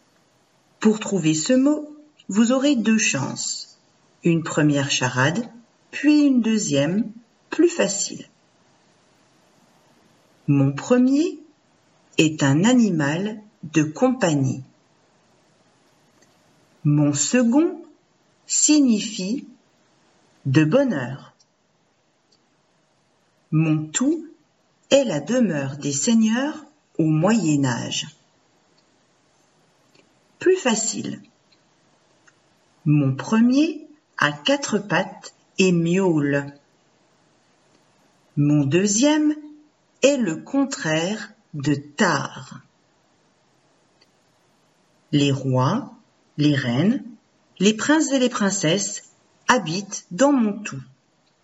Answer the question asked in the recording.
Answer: Château.